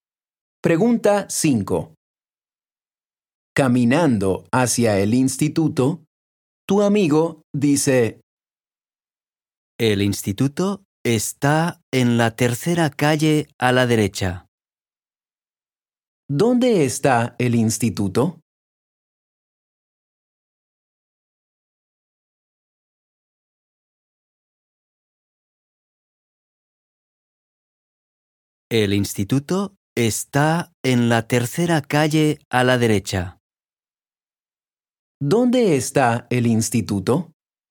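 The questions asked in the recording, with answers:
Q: ¿Dónde está el instituto?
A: en la tercera calle a la derecha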